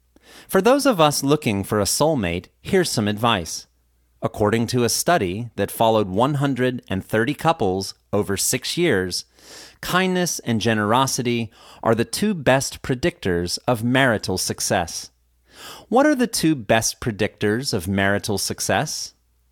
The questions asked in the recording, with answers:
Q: What are the two best predictors of marital success?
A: Kindness and generosity are the two best predictors of marital success.